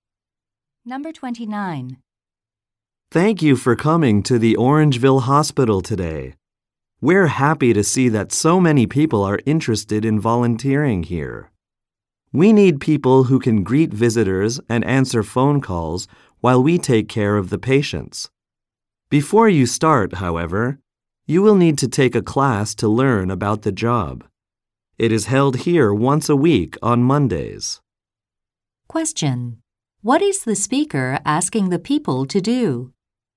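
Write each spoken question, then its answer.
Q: What is the speaker asking the people to do?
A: Take a class to learn about the job before they start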